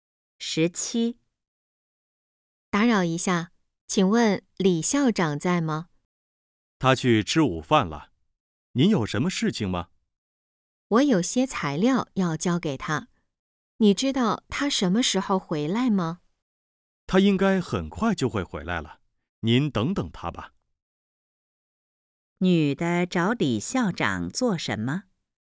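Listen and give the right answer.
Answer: 交材料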